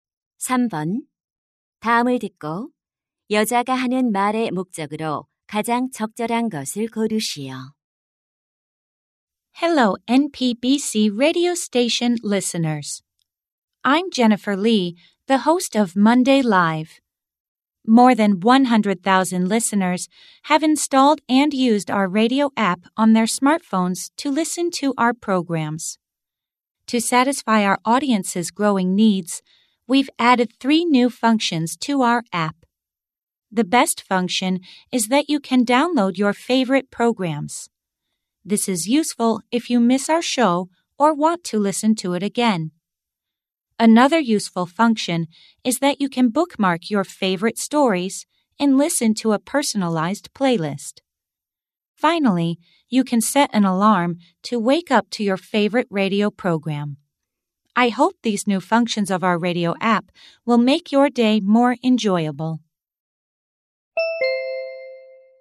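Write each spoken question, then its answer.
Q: 다음을 듣고 여자가 하는 말의 목적으로 가장 적절한 것을 고르시오.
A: 라디오 앱의 새로운 기능을 소개하려고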